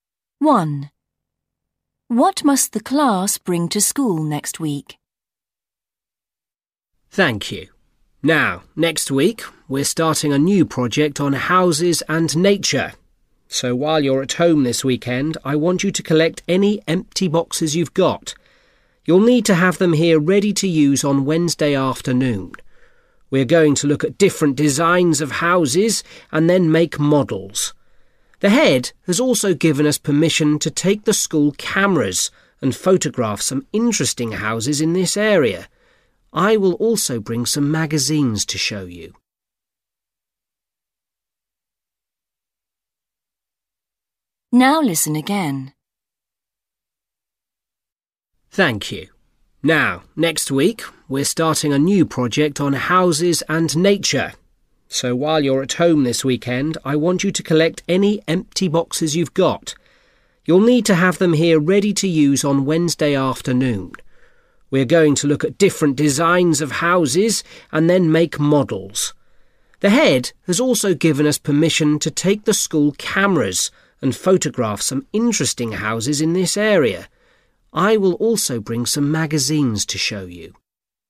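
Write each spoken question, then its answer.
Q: What must the class bring to school next week?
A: empty boxes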